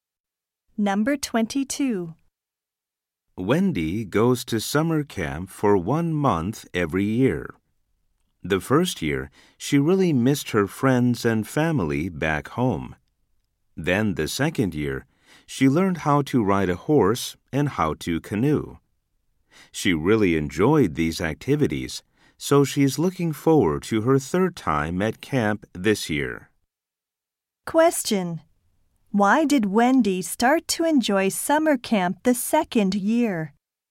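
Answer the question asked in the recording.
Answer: She learned to ride a horse and to canoe.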